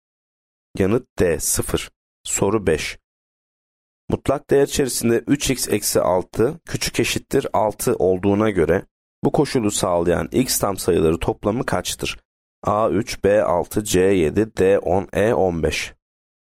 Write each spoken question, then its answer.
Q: Mutlak değer içerisinde 3x eksi 6 küçük eşittir 6 olduğuna göre bu koşulu sağlayan x tam sayıları toplamı kaçtır?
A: Yanıt D 10.